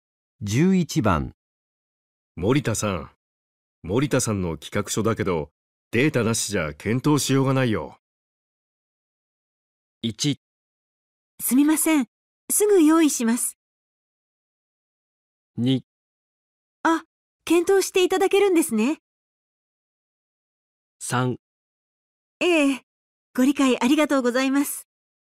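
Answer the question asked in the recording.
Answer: 1: すみませんすぐ用意します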